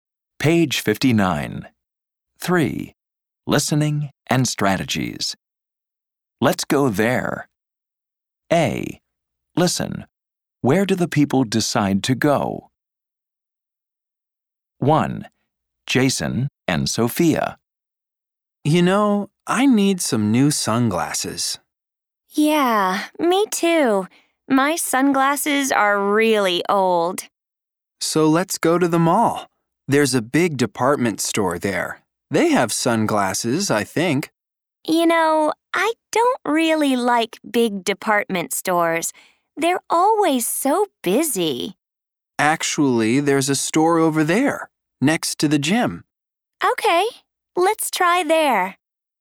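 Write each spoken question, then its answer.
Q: Where do the people decide to go?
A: a store next to the gym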